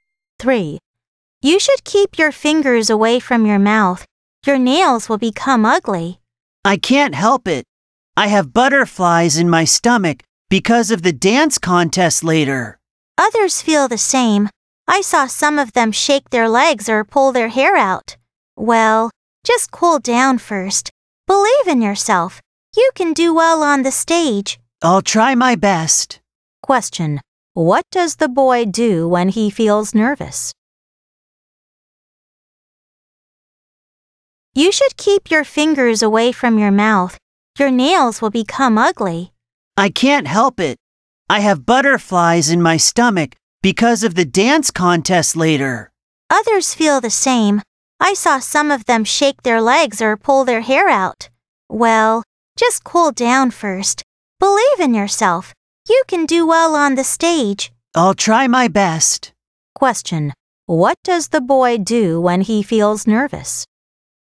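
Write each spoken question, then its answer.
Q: What does the boy do when he feels nervous?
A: He bites his nails (puts his fingers in his mouth)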